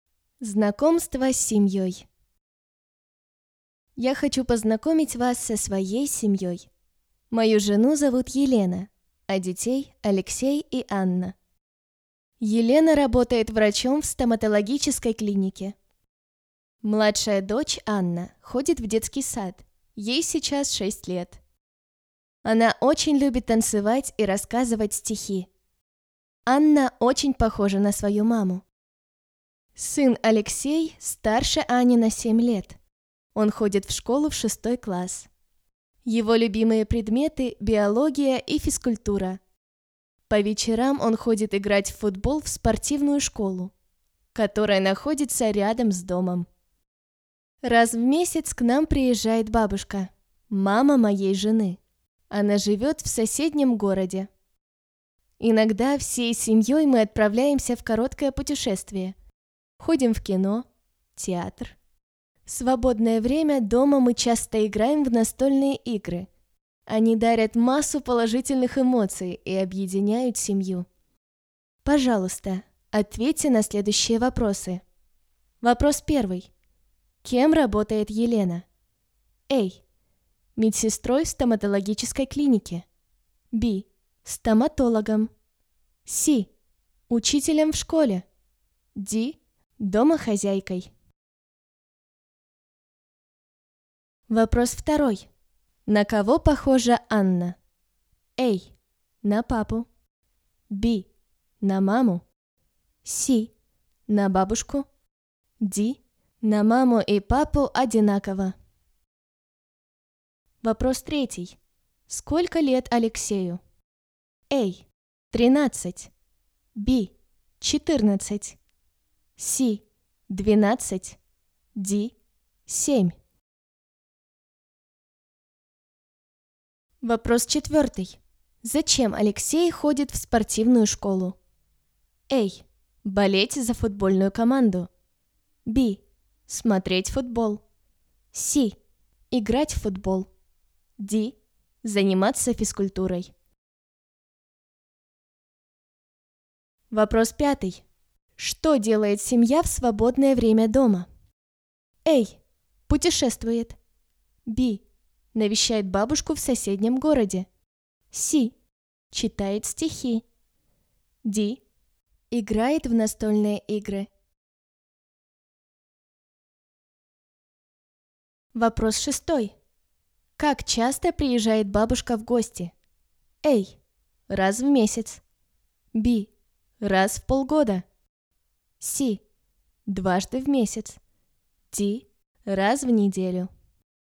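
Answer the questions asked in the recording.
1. Б: Стоматологом
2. Б: На маму
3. А: 13
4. С: Играть в футбол
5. Д: Играет в настольные игры
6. А: Раз в месяц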